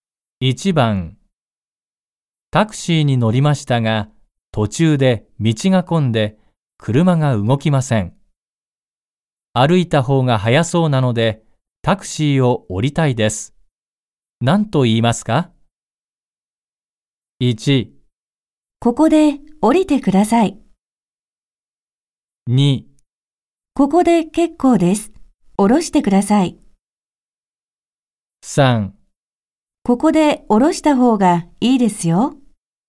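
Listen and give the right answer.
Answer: 2: ここで結構です降ろしてください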